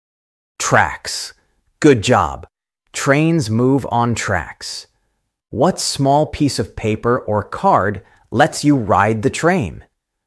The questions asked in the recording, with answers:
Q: What small piece of paper or card lets you ride the train?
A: Ticket. That's right. A ticket lets you ride.